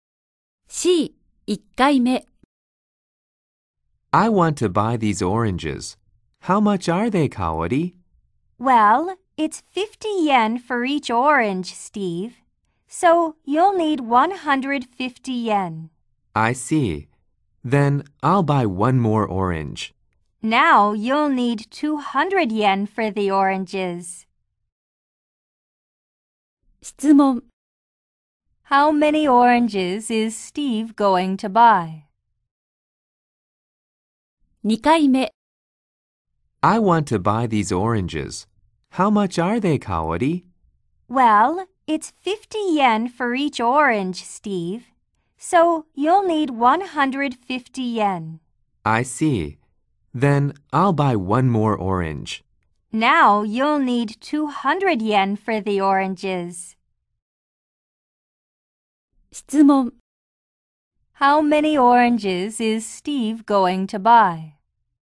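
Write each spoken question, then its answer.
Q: How many oranges is Steve going to buy?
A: Four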